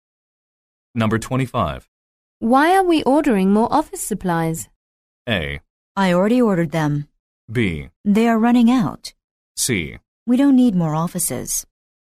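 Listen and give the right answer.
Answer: B: They are running out.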